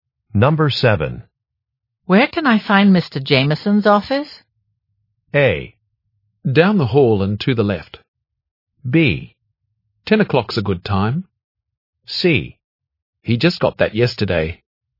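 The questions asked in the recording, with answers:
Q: Where can I find Mr. Jameson's office?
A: A: Down the hall and to the left.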